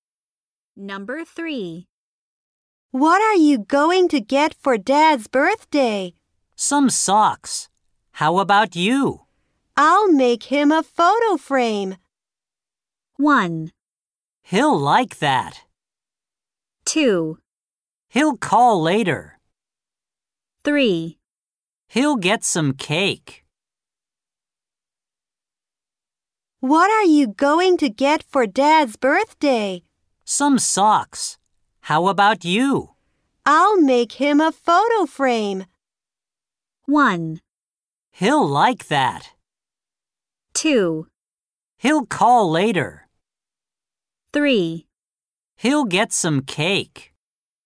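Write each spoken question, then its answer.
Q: I'll make him a photo frame.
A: 1: He'll like that.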